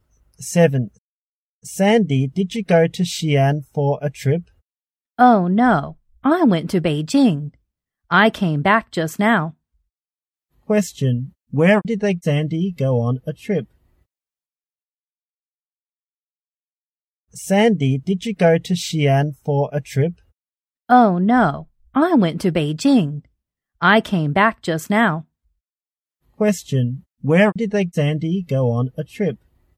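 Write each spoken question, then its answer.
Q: Where did Sandy go on a trip?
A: Beijing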